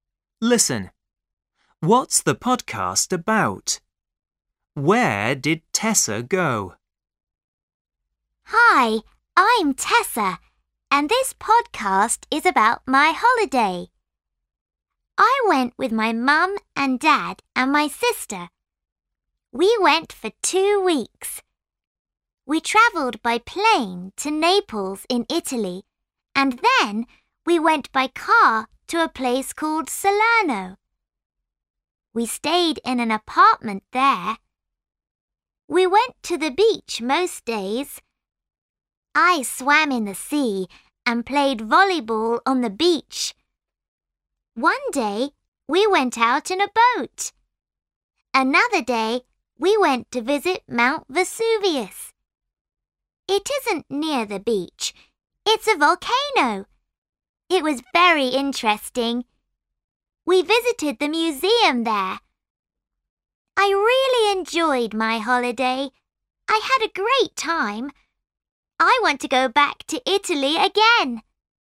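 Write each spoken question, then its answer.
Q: What's the podcast about?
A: Tessa's holiday

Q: Where did Tessa go?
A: Italy (Naples and Salerno)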